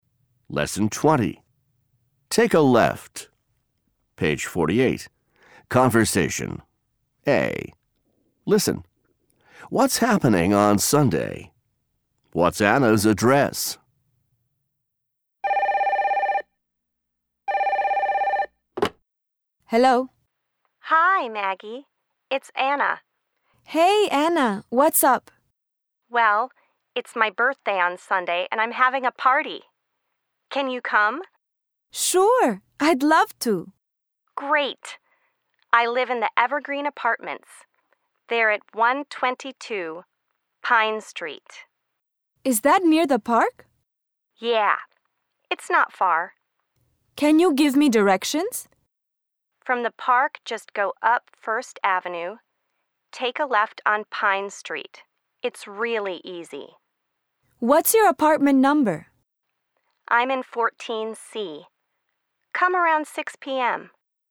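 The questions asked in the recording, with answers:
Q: What's happening on Sunday?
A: Anna's birthday party

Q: What's Anna's address?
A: 122 Pine Street, Evergreen Apartments, 14C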